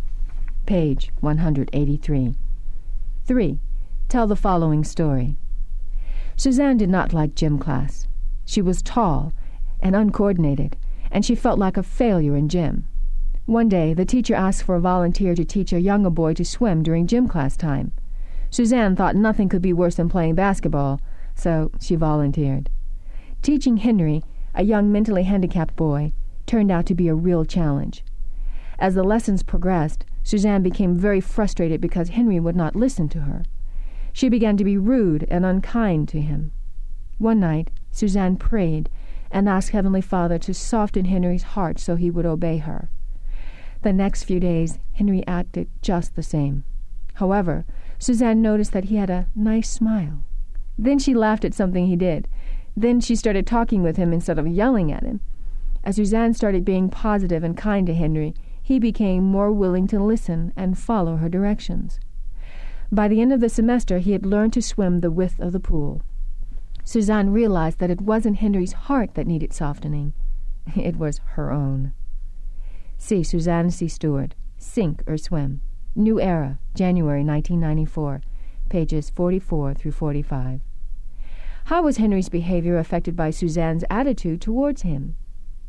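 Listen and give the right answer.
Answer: When she became positive and kind, he was more willing to listen and follow her directions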